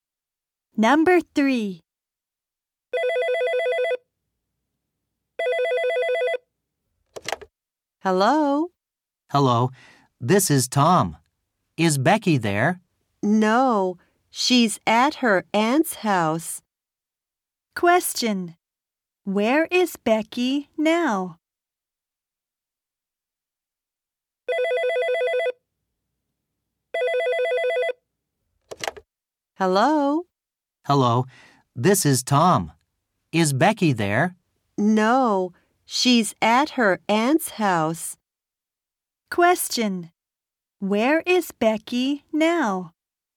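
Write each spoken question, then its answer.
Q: where is Becky now?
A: At her aunt's house.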